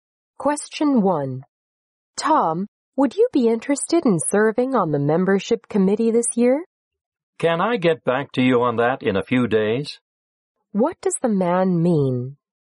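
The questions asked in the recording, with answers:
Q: What does the man mean?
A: He needs a few days to think about it before deciding.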